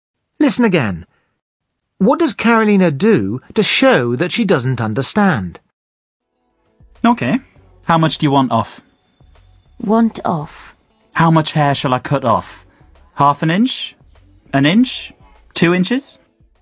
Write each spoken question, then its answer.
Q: What does Carolina do to show that she doesn't understand?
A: She just repeats the words that she doesn't understand as a question.